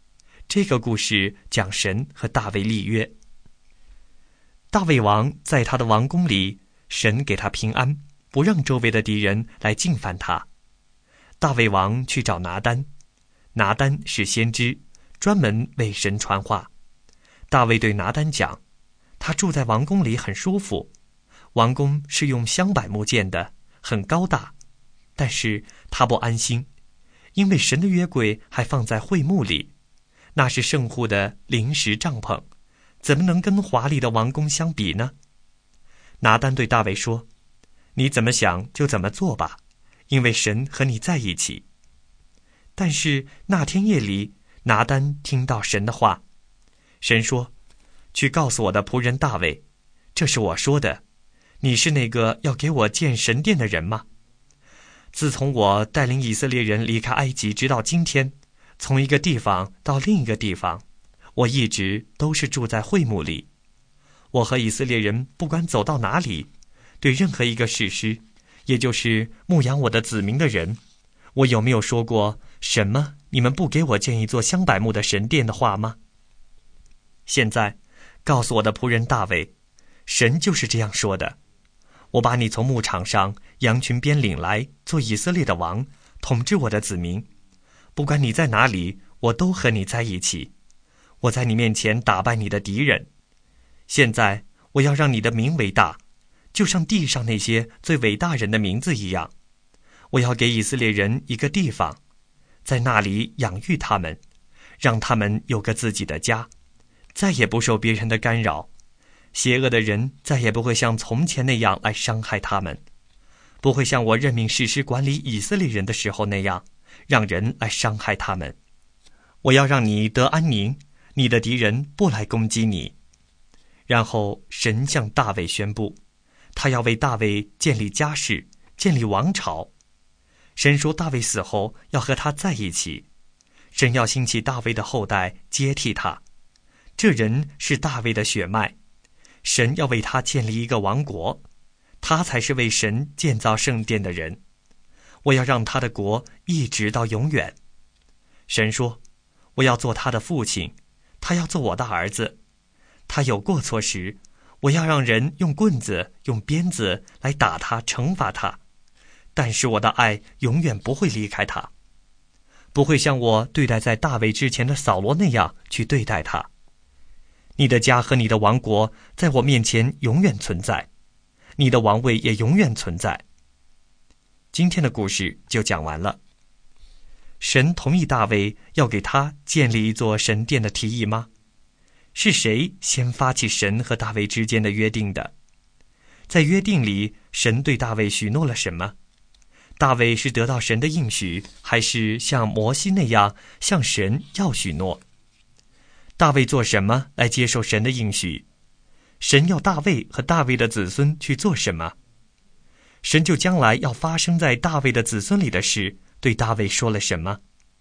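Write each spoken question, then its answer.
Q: 神同意大卫要给他建立一座神殿的提议吗?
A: 不同意,神说大卫的后代才是为神建造圣殿的人

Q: 在约定里,神对大卫许诺了什么?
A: 让他的名为大,为他建立家室和王朝,他的王国和王位永远存在

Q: 神就将来要发生在大卫的子孙里的事对大卫说了什么?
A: 神要兴起大卫的后代接替他,为神建造圣殿,神要坚定他的国直到永远,做他的父亲,爱永不离开他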